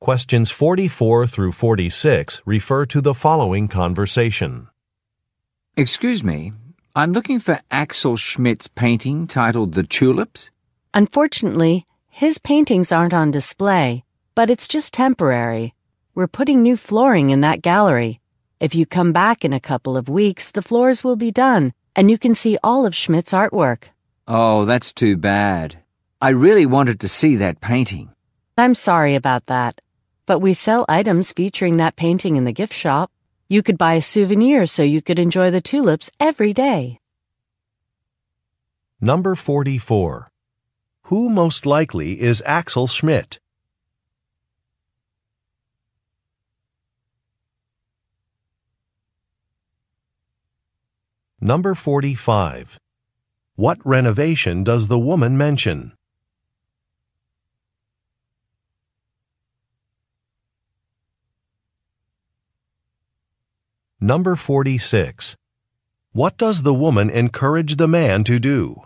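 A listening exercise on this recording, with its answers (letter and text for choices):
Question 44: Who most likely is Axel Schmidt?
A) A store manager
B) A construction worker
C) A journalist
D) An artist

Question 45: What renovation does the woman mention?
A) Some walls are being painted.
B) Some floors are being replaced.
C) Some windows are being installed.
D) Some light fixtures are being repaired.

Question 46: What does the woman encourage the man to do?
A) Visit a gift shop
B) Send a package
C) Wait for a bus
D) Take a photograph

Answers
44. D) An artist
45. B) Some floors are being replaced.
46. A) Visit a gift shop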